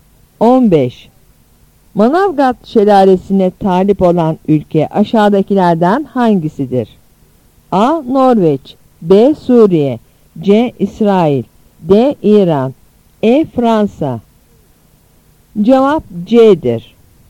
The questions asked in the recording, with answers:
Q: Manavgat şelalesine talip olan ülke aşağıdakilerden hangisidir?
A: Cevap C'dir.